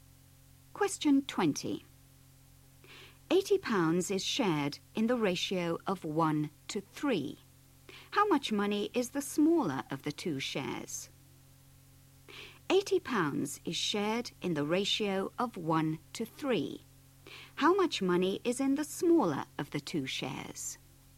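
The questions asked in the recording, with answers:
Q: How much money is the smaller of the two shares?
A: £20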